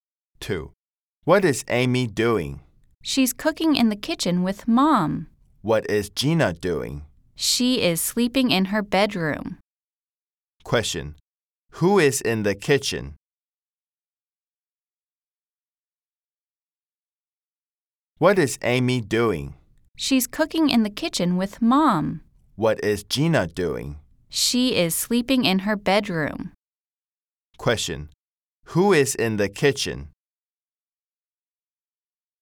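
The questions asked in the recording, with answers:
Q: Question. Who is in the kitchen?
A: Amy and Mom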